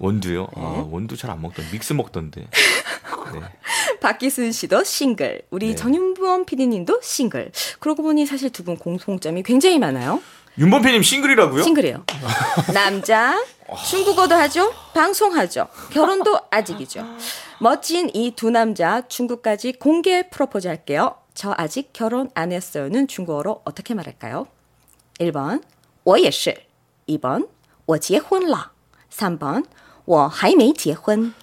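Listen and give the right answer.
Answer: 3: 我还没结婚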